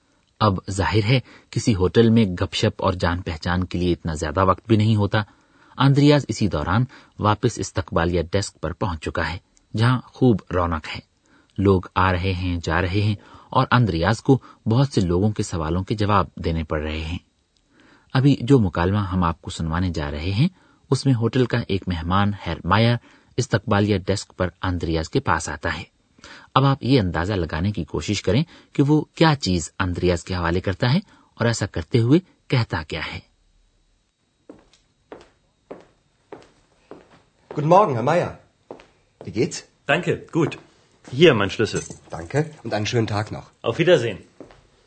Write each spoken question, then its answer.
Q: اب آپ یہ اندازہ لگانے کی کوشش کریں کہ وہ کیا چیز اندریاز کے حوالے کرتا ہے اور ایسا کرتے ہوئے کہتا کیا ہے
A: Herr Meier, اپنے کمرے کی چابی میز پر رکھتا ہے اور اندریا سے مخاطب ہو کر کہتا ہے یہ رہی میری چابی Hier, mein Schlüssel.